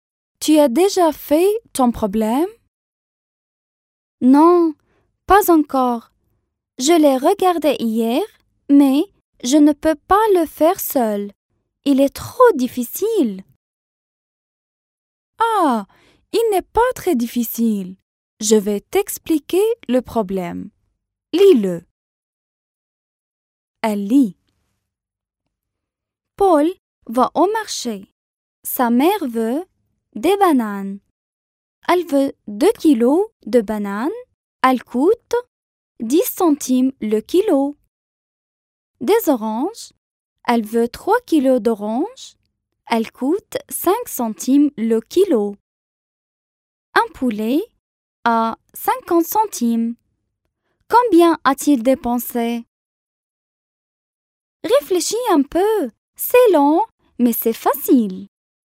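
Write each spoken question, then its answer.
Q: Combien a-t-il dépensé?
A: 85 centimes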